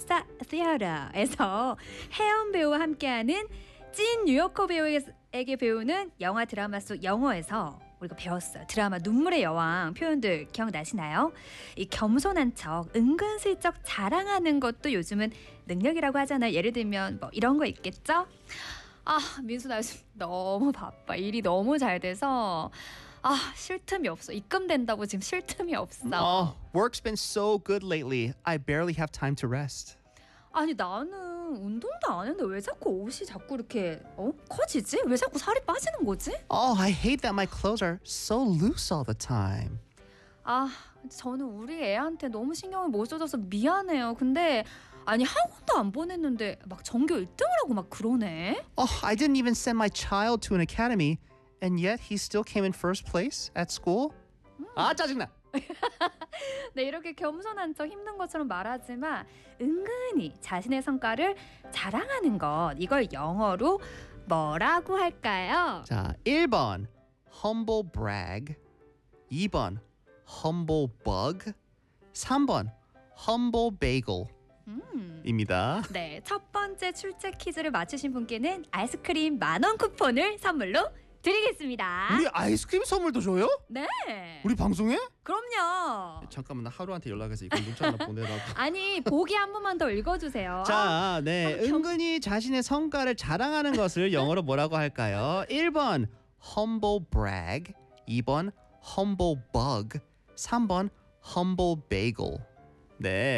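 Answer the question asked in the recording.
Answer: 1번: humble brag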